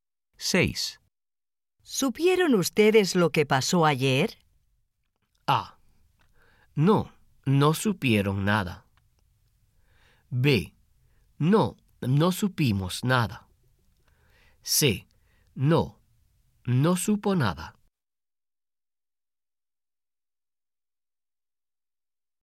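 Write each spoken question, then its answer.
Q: ¿Supieron ustedes lo que pasó ayer?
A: B: No, no supimos nada.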